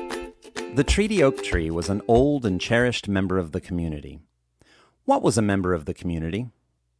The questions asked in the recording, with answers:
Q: What was a member of the community?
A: The Treaty Oak Tree was a member of the community.